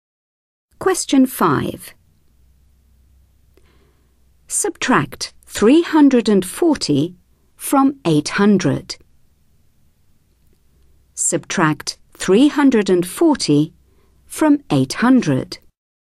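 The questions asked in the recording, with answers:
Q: Subtract 340 from 800.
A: 460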